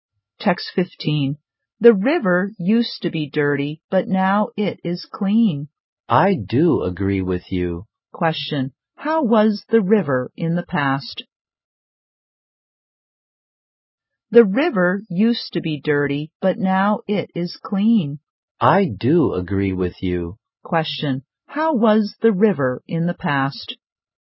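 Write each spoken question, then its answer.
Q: How was the river in the past?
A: Dirty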